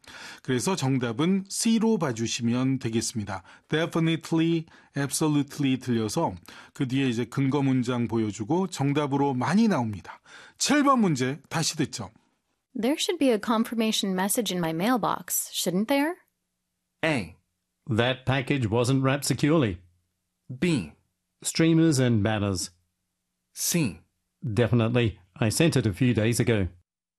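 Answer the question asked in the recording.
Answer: C: Definitely, I sent it a few days ago.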